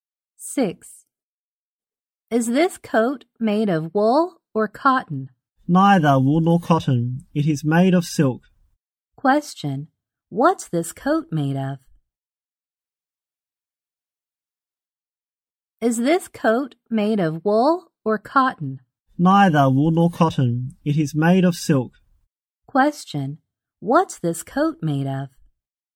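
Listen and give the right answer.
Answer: Silk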